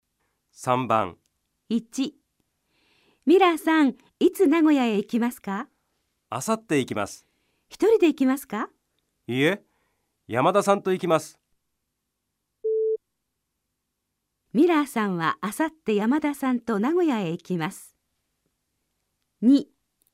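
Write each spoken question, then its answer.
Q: ミラーさんはあさって山田さんと名古屋へ行きます。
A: 正しい(○)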